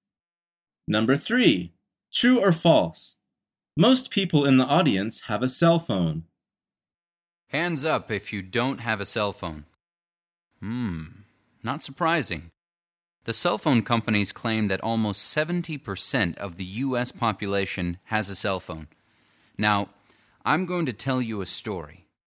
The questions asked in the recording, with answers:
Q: True or false? Most people in the audience have a cell phone.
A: The answer is true.